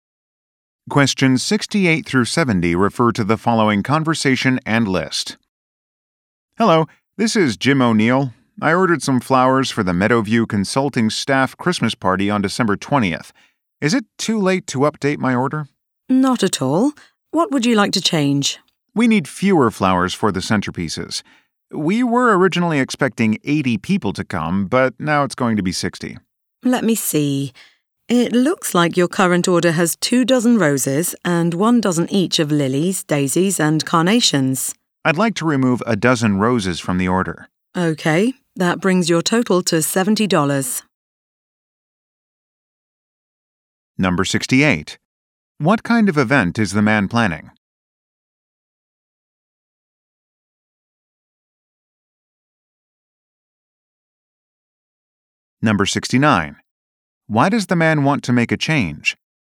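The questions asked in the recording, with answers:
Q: What kind of event is the man planning?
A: A staff Christmas party

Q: Why does the man want to make a change?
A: Fewer people are coming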